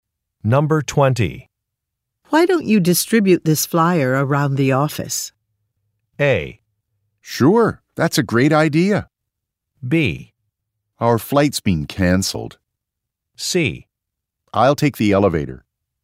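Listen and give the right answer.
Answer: A: Sure, that's a great idea.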